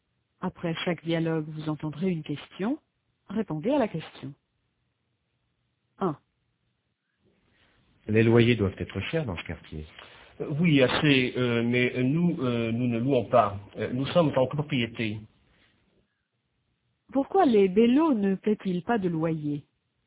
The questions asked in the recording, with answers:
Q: Pourquoi les bellos ne paient-ils pas de loyer?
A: Parce qu'ils sont en copropriété.